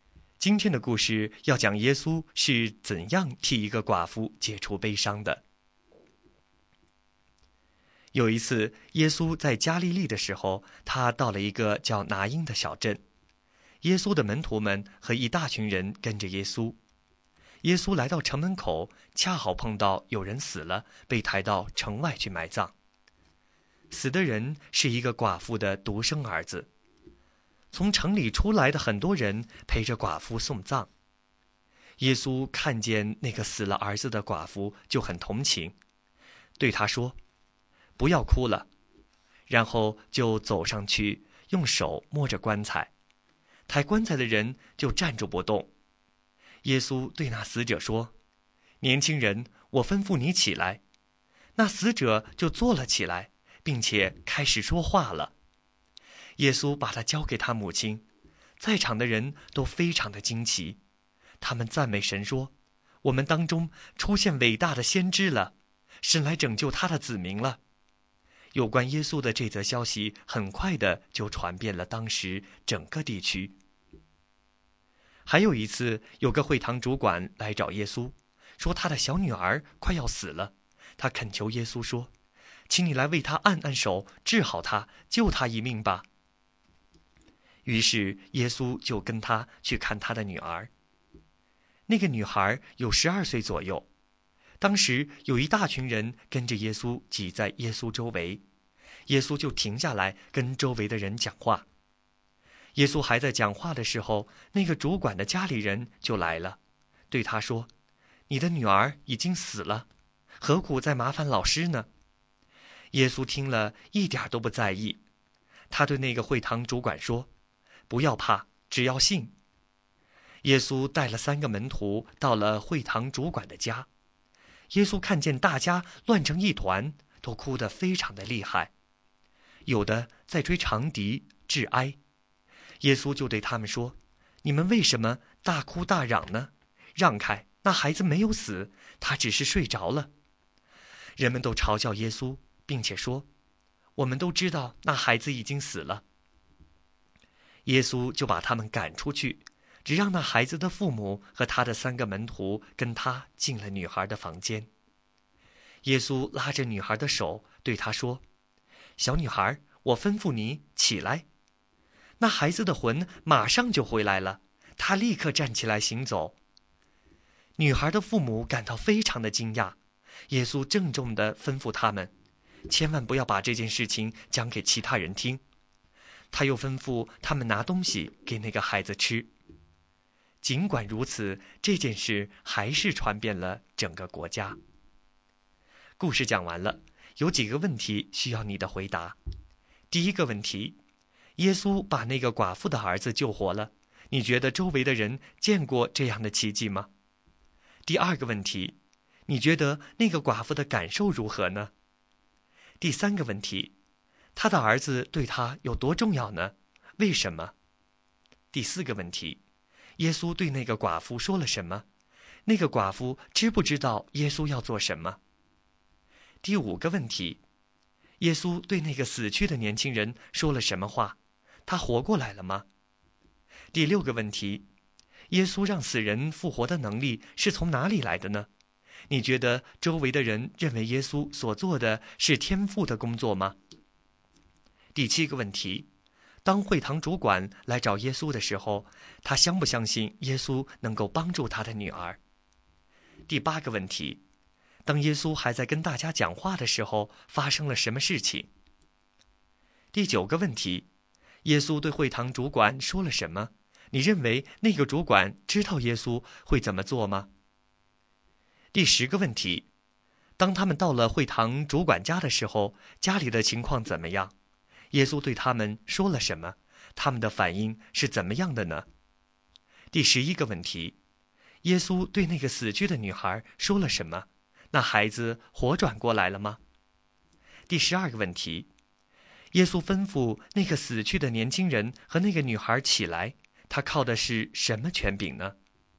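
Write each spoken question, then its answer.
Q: 耶稣对那个寡妇说了什么?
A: 不要哭了

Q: 耶稣对那个死去的年轻人说了什么话?他活过来了吗?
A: 年轻人,我吩咐你起来;活过来了

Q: 当耶稣还在跟大家讲话的时候,发生了什么事情?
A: 主管的家里人来说他的女儿已经死了

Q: 耶稣对会堂主管说了什么?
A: 不要怕,只要信

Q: 当他们到了会堂主管家的时候,家里的情况怎么样?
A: 大家乱成一团,哭得很厉害,有人吹长笛致哀

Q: 耶稣对那个死去的女孩说了什么?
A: 小女孩,我吩咐你起来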